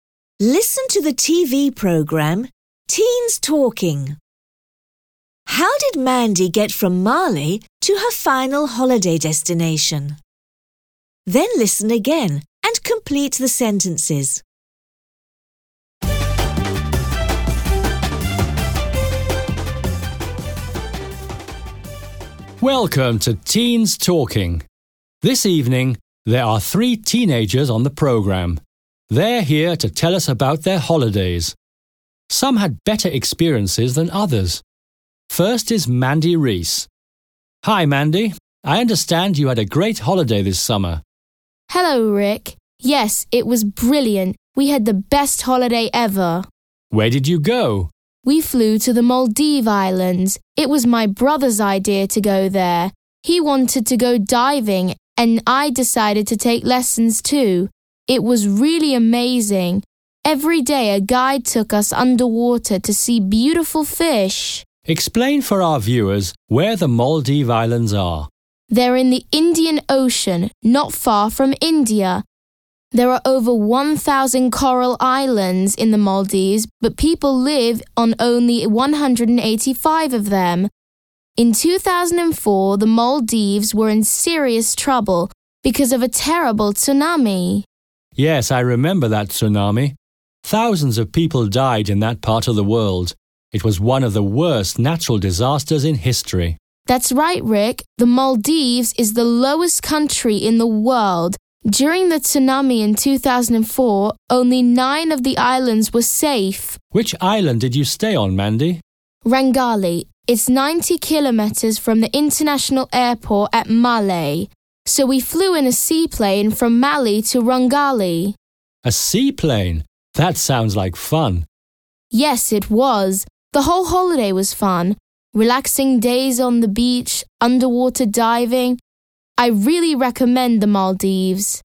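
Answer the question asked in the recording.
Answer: She flew in a seaplane.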